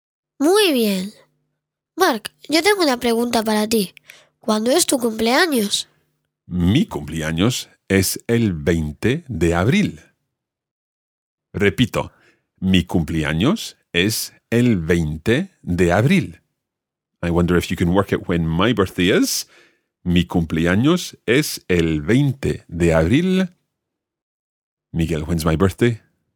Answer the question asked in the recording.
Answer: El 20 de abril.